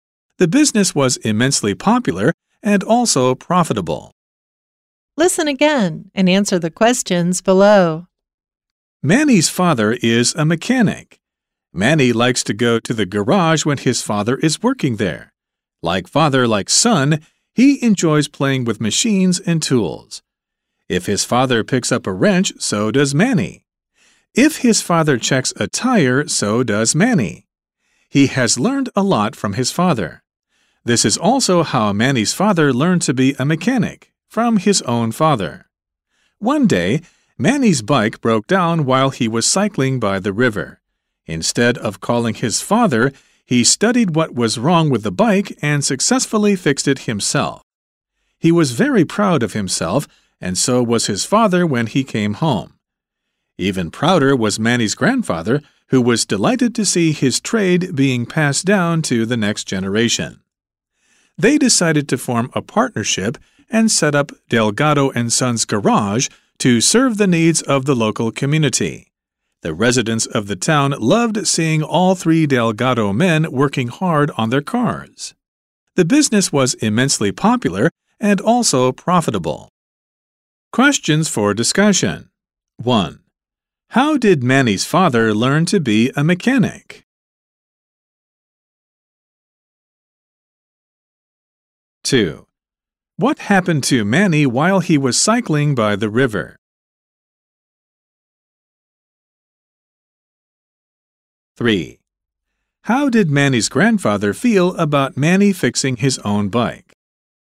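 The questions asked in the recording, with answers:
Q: How did Manny's father learn to be a mechanic?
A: From his own father

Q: What happened to Manny while he was cycling by the river?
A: His bike broke down, and he fixed it himself

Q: How did Manny's grandfather feel about Manny fixing his own bike?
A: Even prouder; delighted to see his trade passed down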